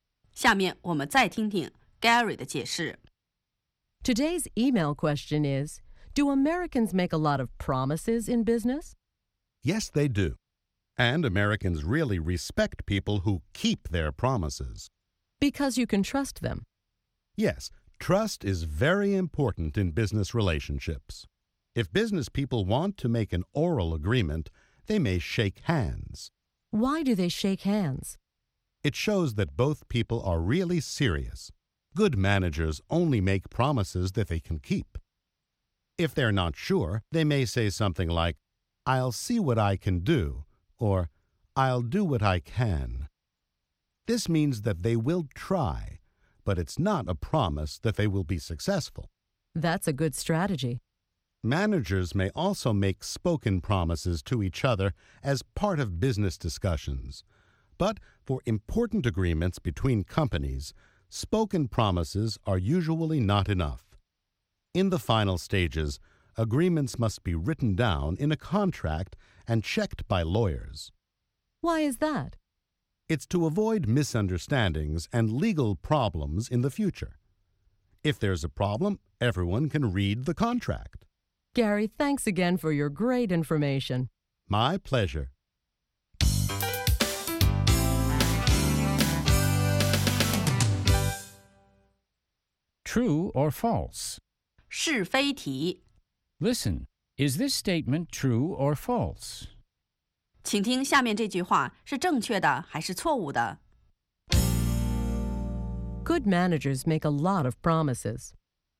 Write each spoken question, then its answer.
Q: Good managers make a lot of promises.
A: False. Good managers only make promises that they can keep.